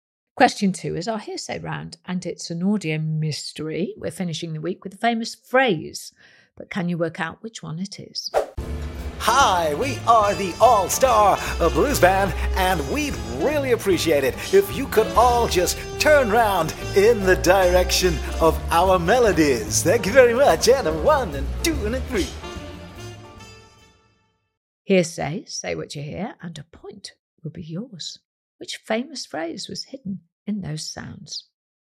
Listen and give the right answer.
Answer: What was it? Well, it was, of course, Face the Music.